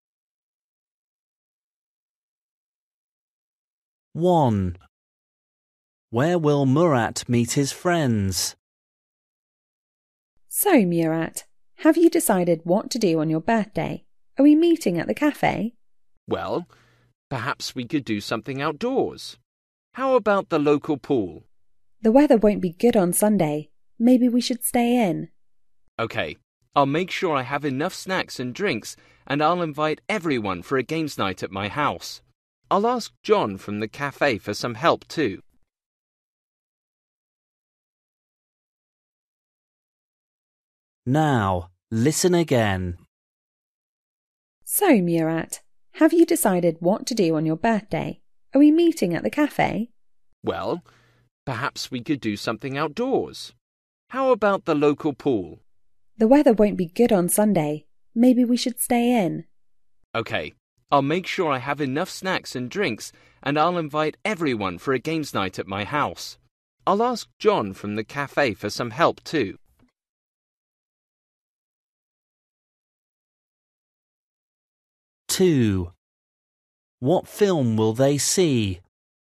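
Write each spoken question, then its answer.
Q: Where will Murat meet his friends?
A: at Murat's house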